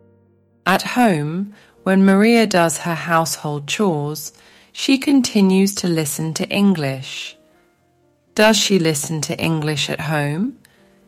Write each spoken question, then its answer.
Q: Does she listen to English at home?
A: Yes, she does. She listens to English at home too.